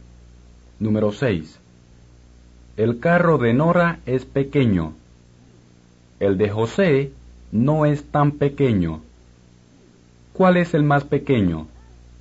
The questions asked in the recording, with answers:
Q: ¿Cuál es el más pequeño?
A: El carro de Nora, o el de Nora, es el más pequeño.